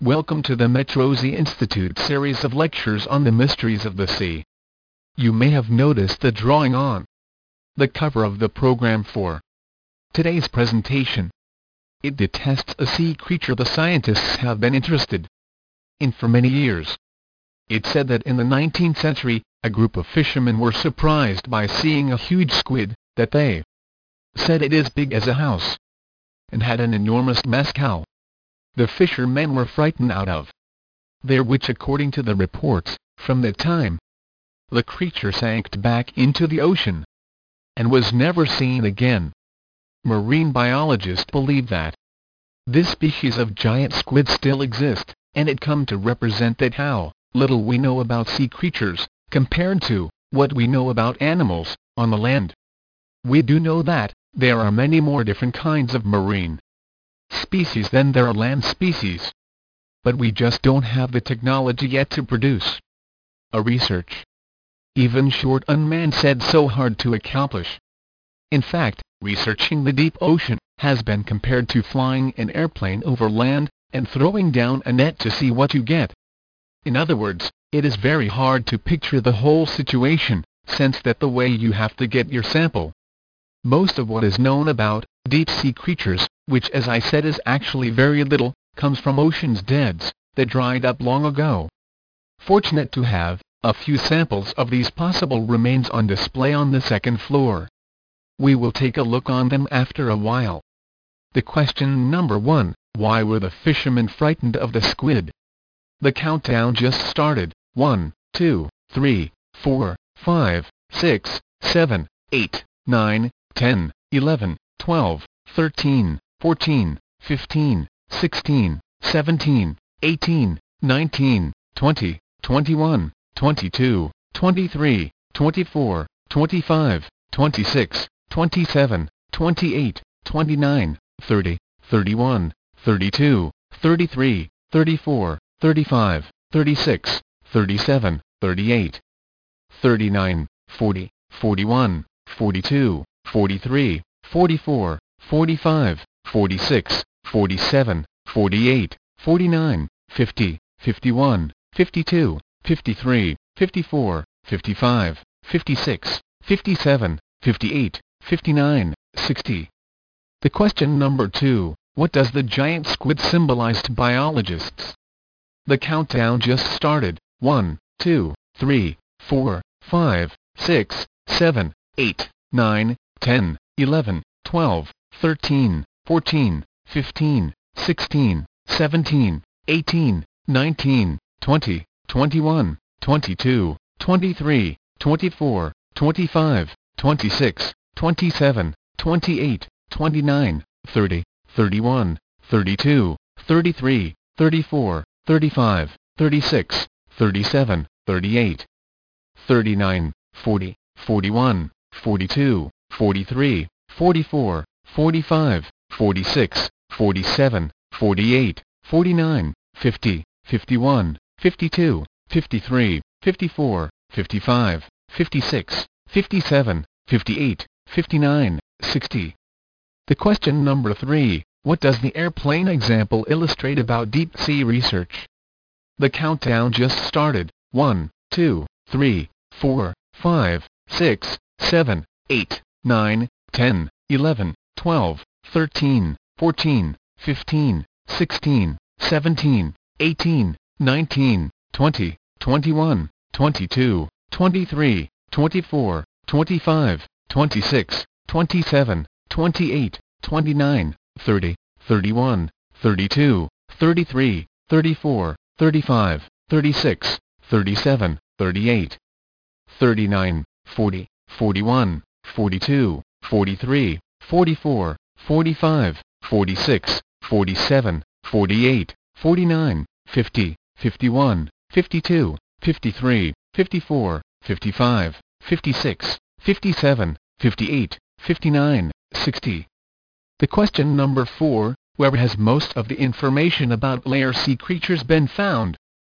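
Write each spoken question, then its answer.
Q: what does the giant squid symbolize to biologists?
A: How little we know about sea creatures compared to land animals

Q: what does the airplane example illustrate about deep sea research?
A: It is very hard to get a picture of the whole situation from the samples

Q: where has most of the information about layer sea creatures been found?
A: In ocean beds that dried up long ago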